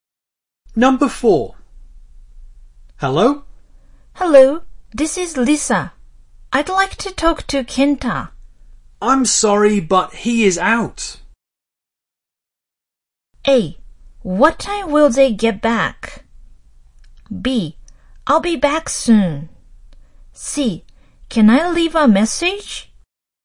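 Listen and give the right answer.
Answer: C: Can I leave a message?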